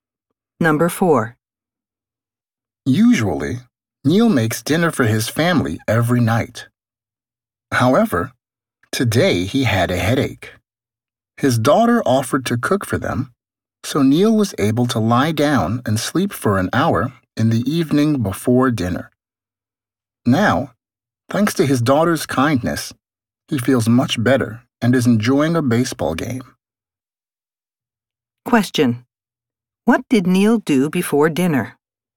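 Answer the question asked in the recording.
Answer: He lay down and slept for an hour.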